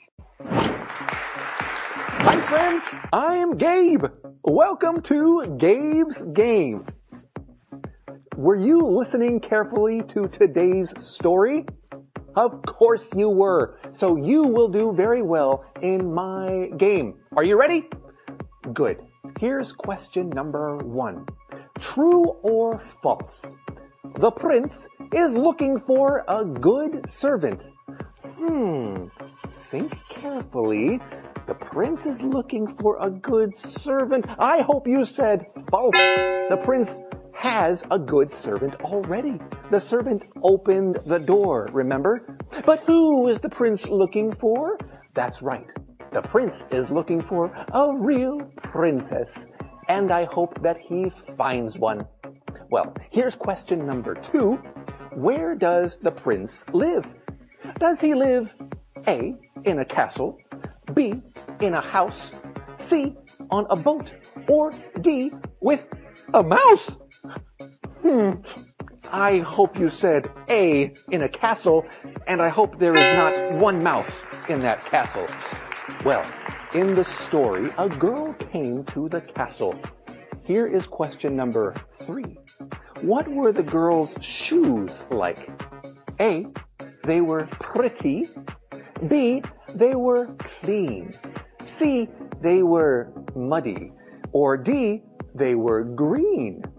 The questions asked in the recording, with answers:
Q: True or false? The prince is looking for a good servant.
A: I hope you said false.

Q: Where does the prince live?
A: I hope you said A, in a castle